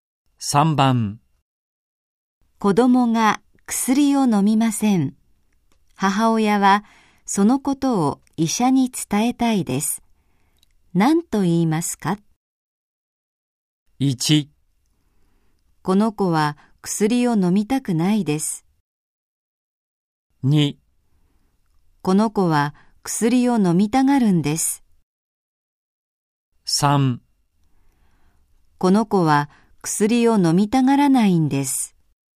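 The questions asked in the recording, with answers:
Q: 何と言いますか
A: 3: この子は薬を飲みたがらないんです。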